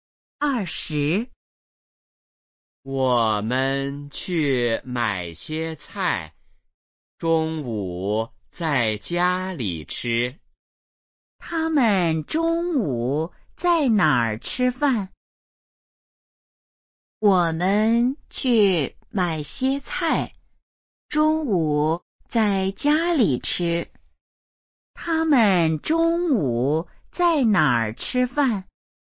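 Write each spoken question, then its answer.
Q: 他们中午在哪儿吃饭?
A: 在家里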